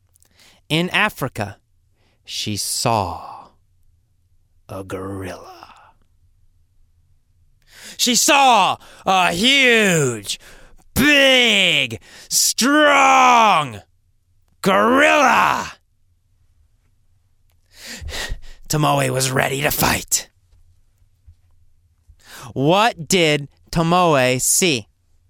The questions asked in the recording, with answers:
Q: What did Tomoe see?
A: She saw a huge, strong, brute gorilla.